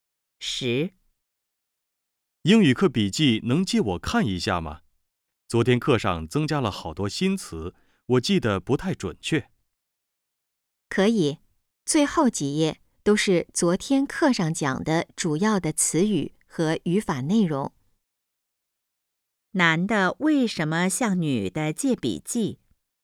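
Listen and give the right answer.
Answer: 昨天课上的新词记得不太准确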